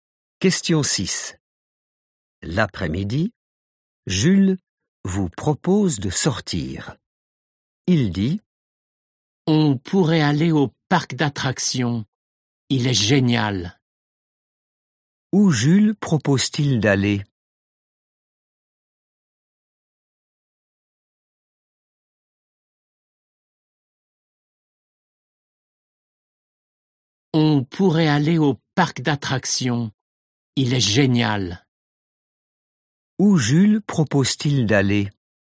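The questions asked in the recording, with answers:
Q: Où Jules propose-t-il d'aller?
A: au parc d'attractions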